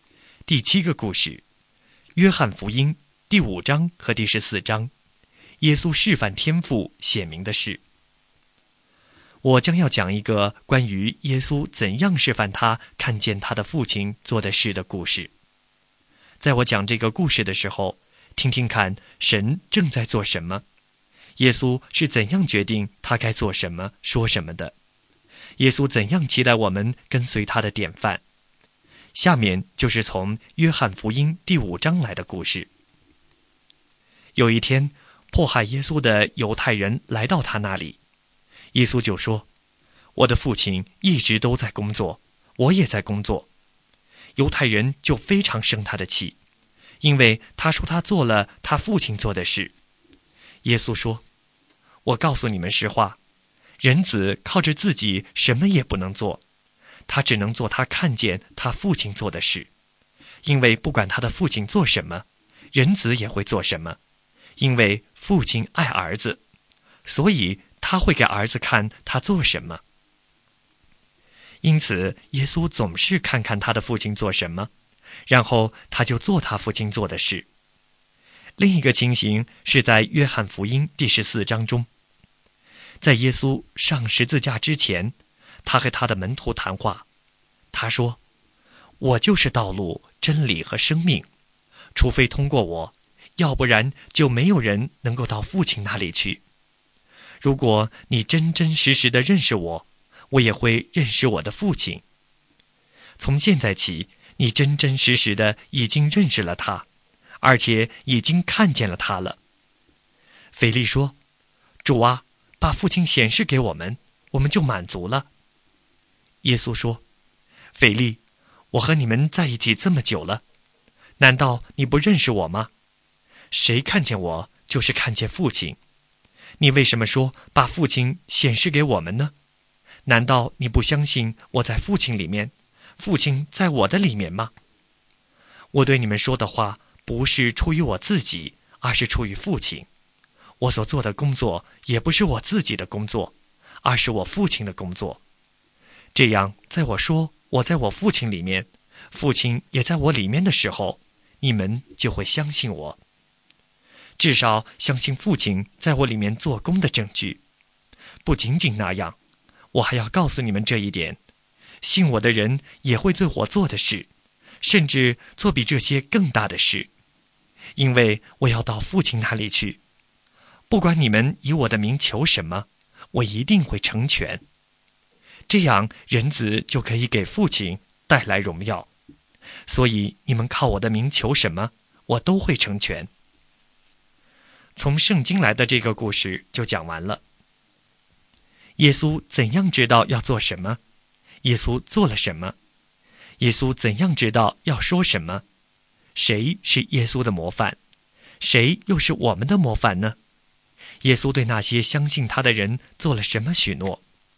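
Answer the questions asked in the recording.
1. 看他的父亲做什么,然后做父亲做的事
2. 他做他看见父亲做的事
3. 他说的话出于父亲,不是出于自己
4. 天父
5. 耶稣
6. 信他的人也会做他做的事,甚至更大的事;奉他的名求什么,他都会成全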